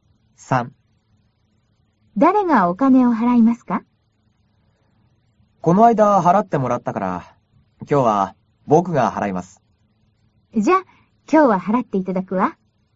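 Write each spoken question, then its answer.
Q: 誰がお金を払いますか?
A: 男の人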